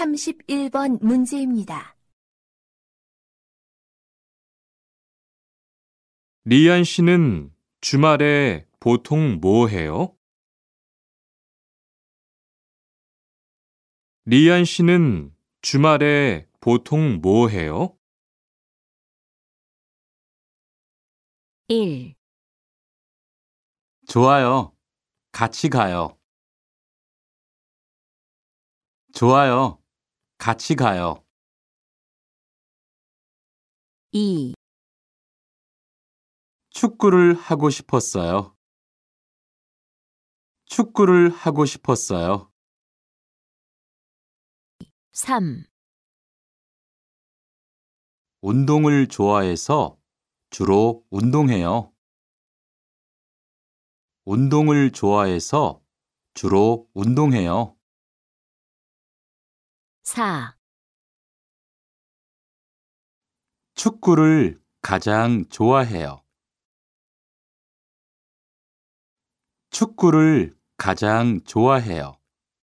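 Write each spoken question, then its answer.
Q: 리안 씨는 주말에 보통 뭐 해요?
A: 3: 운동을 좋아해서 주로 운동해요.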